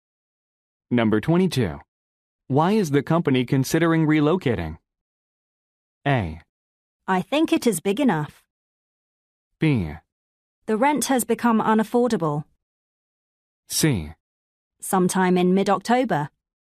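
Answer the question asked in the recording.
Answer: B: The rent has become unaffordable.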